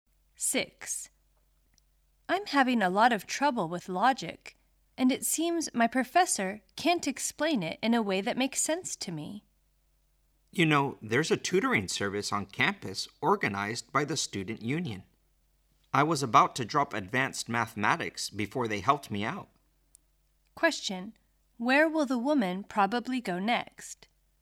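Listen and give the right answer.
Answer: To the campus tutoring service run by the student union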